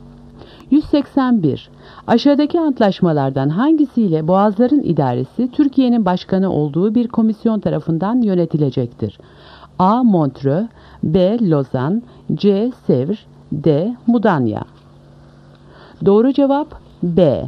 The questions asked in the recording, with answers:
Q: Aşağıdaki antlaşmalardan hangisiyle Boğazların İdaresi Türkiye'nin başkanı olduğu bir komisyon tarafından yönetilecektir?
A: Doğru cevap B. Lozan.